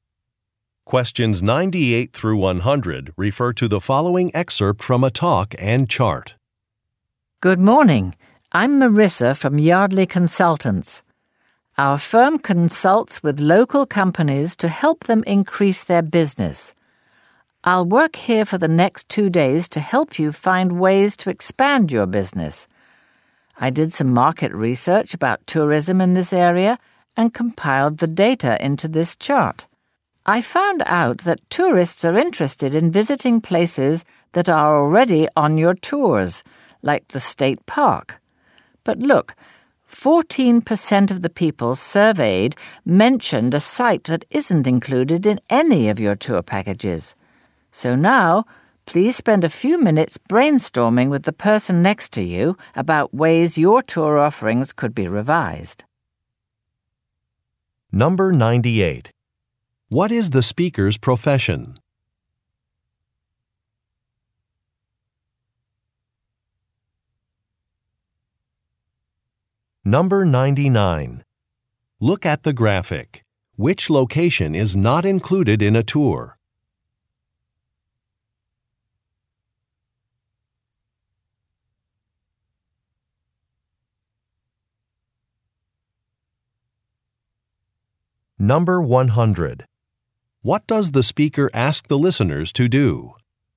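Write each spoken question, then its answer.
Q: What is the speaker's profession?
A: Business consultant

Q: What does the speaker ask the listeners to do?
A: Brainstorm with a partner about revising tour offerings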